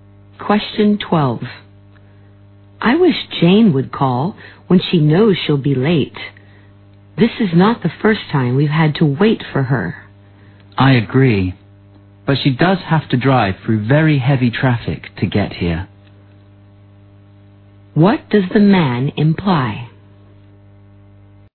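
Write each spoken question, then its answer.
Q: What does the man imply?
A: Jane's lateness is understandable because of the heavy traffic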